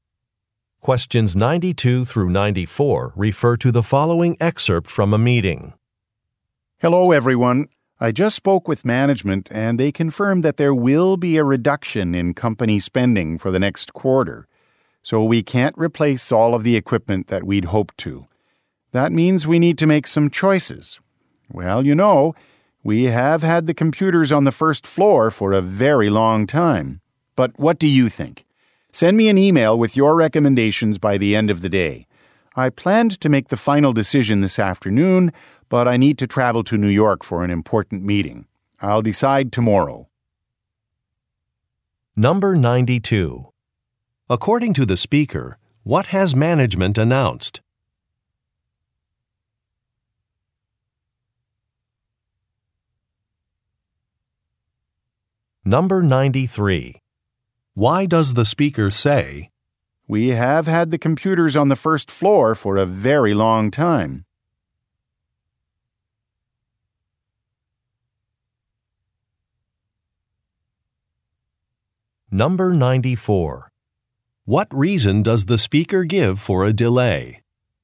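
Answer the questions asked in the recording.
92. A reduction in company spending
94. She has to travel to New York for an important meeting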